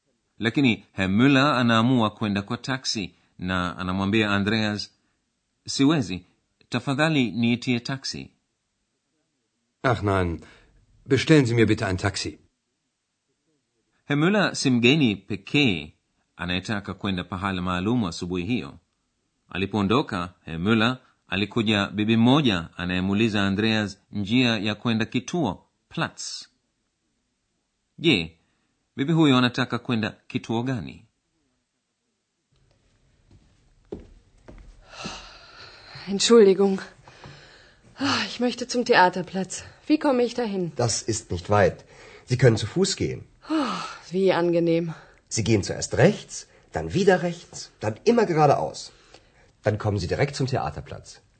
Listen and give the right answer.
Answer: Kituo anachokitafuta bibi huyo kinaitwa Theaterplatz.